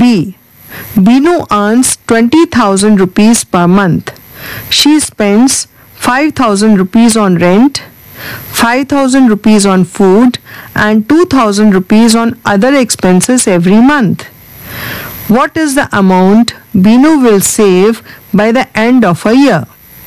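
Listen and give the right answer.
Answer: 96,000 rupees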